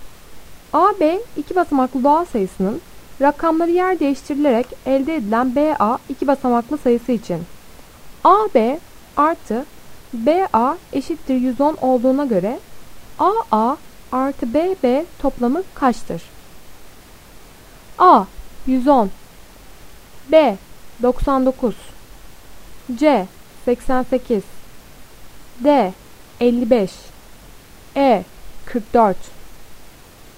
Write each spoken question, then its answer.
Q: A, B iki basamaklı doğal sayısının rakamları yer değiştirilerek elde edilen BA iki basamaklı sayısı için AB artı BA eşittir 110 olduğuna göre AA artı BB toplamı kaçtır?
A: Doğru cevap A 110.